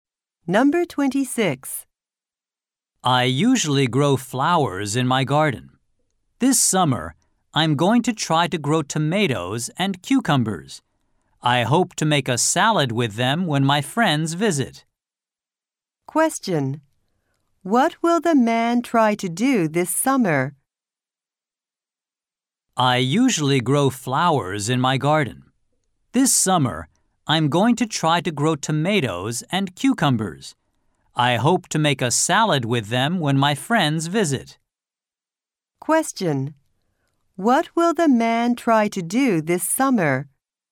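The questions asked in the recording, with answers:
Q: What will the man try to do this summer?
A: Grow tomatoes and cucumbers.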